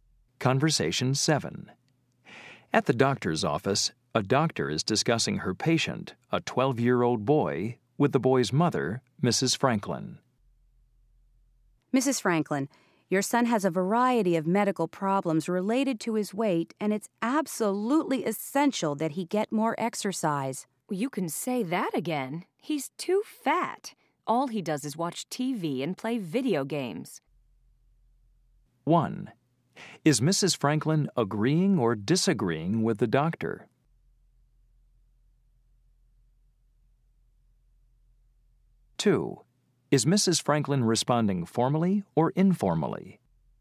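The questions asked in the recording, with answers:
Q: Is Mrs. Franklin agreeing or disagreeing with the doctor?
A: agreeing

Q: Is Mrs. Franklin responding formally or informally?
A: informally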